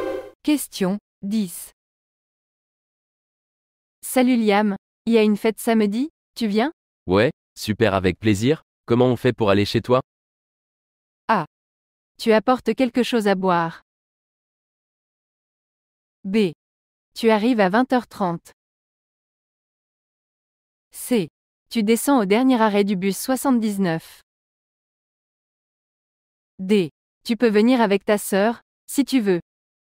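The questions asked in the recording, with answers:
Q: Comment on fait pour aller chez toi?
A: C: Tu descends au dernier arrêt du bus 79.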